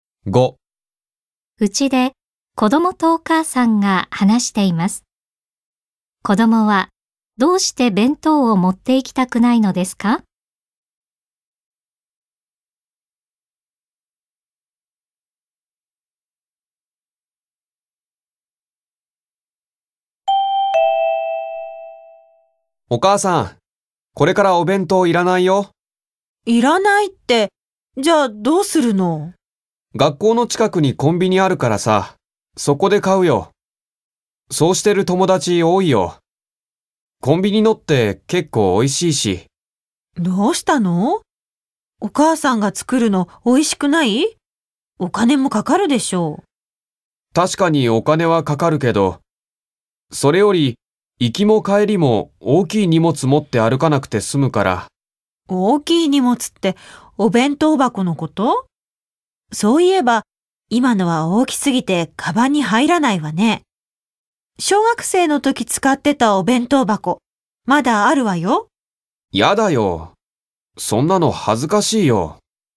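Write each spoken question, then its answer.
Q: 子供はどうして弁当を持って行きたくないのですか?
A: 弁当箱が大きくて、行きも帰りも大きい荷物を持って歩きたくないから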